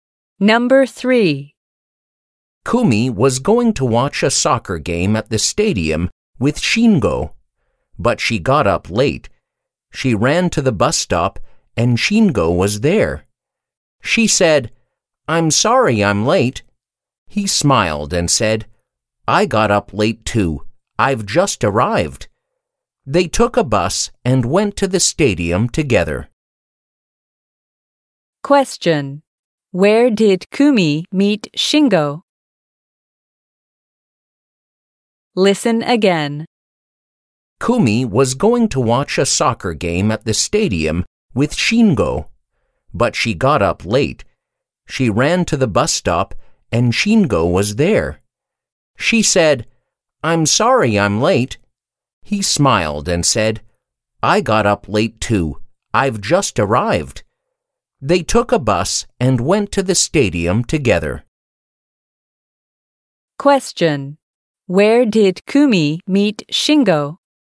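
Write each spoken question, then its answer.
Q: Where did Kumi meet Shingo?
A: At the bus stop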